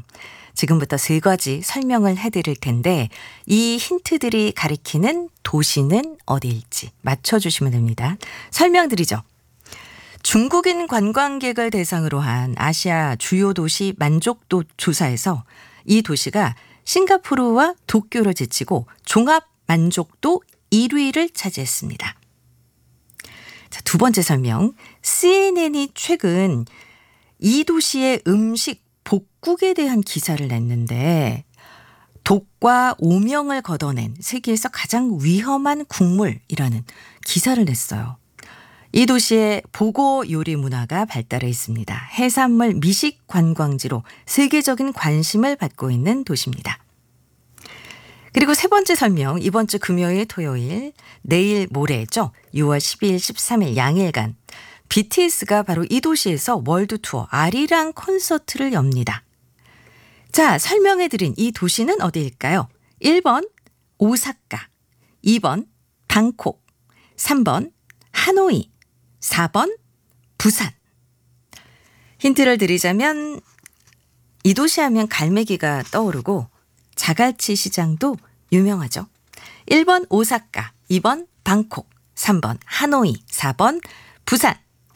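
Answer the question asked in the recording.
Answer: 4: 부산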